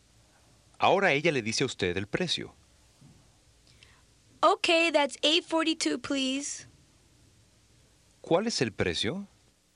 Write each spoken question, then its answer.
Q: ¿Cuál es el precio?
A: $8.42, please.